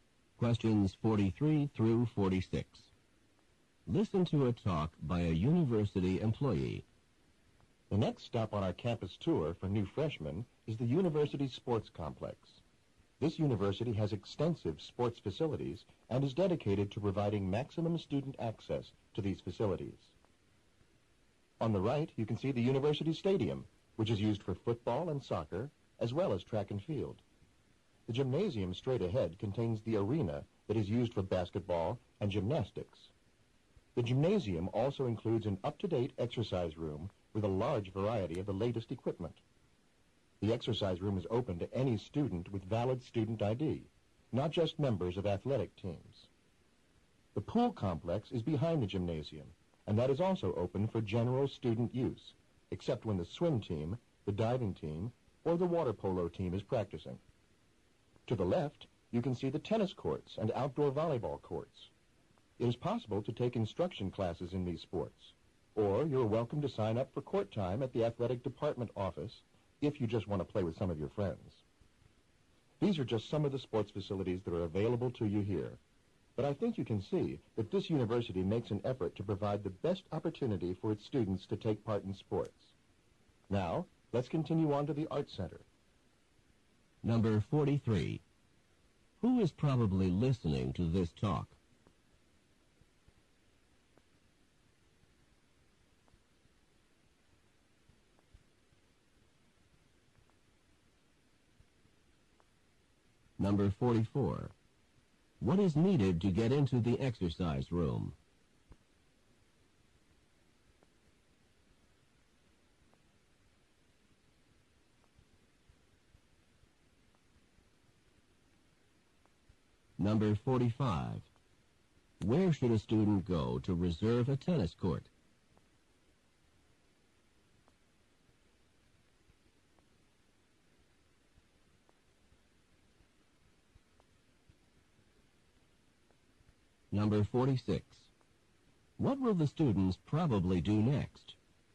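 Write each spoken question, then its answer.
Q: Who is probably listening to this talk?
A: New freshmen

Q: What is needed to get into the exercise room?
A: A valid student ID

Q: Where should a student go to reserve a tennis court?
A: The athletic department office

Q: What will the students probably do next?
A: Go to the Art Center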